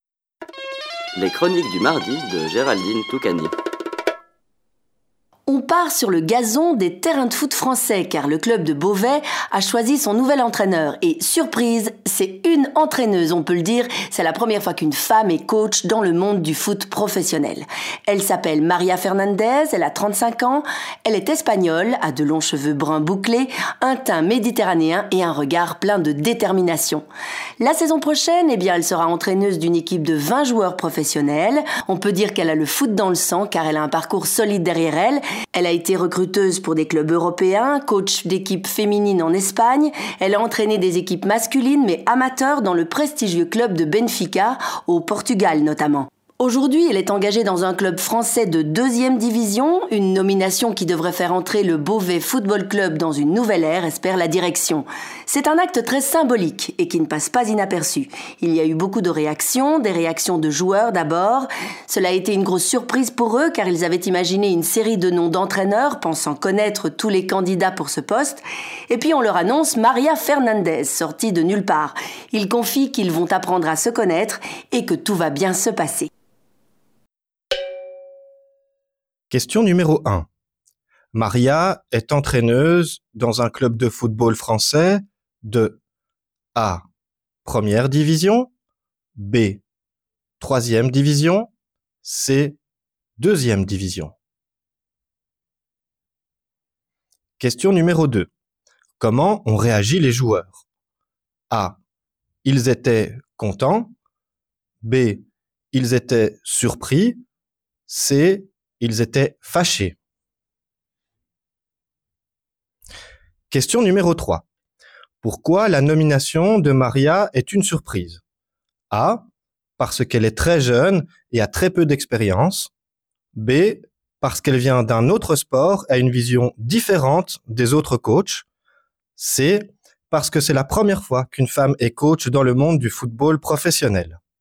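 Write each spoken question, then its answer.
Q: Maria est entraîneuse dans un club de football français de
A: C: Deuxième division

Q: Comment ont réagi les joueurs?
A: B: Ils étaient surpris

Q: Pourquoi la nomination de Maria est une surprise?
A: C: Parce que c'est la première fois qu'une femme est coach dans le monde du football professionnel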